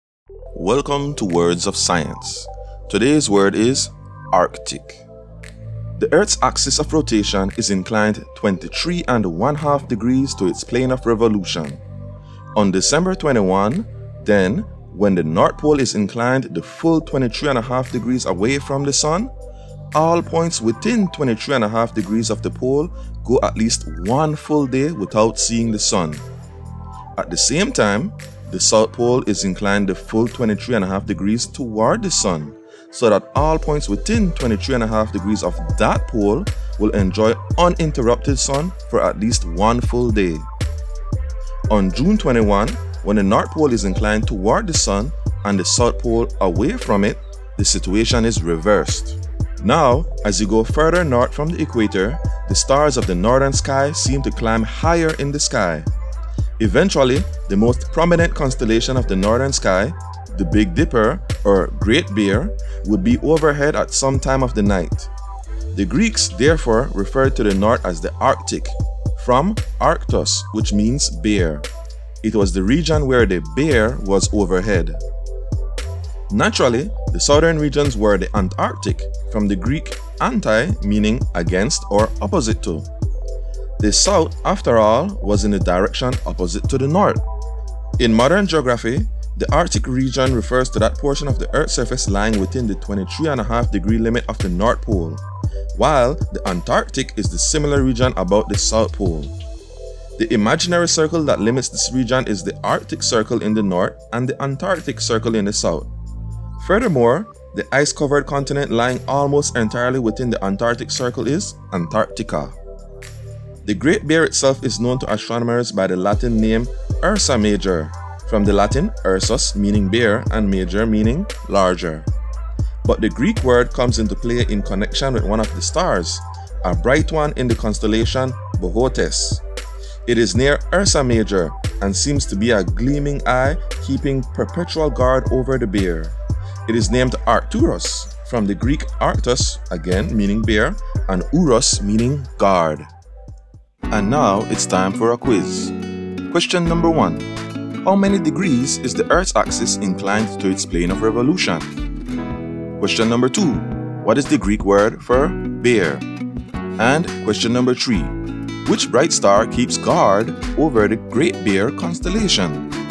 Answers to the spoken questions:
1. 23.5 degrees
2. Arctos
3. Arcturus